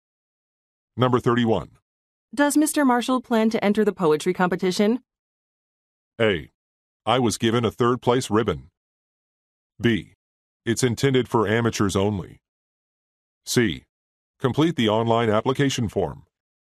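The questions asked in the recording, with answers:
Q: Does Mr. Marshall plan to enter the poetry competition?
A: B: It's intended for amateurs only.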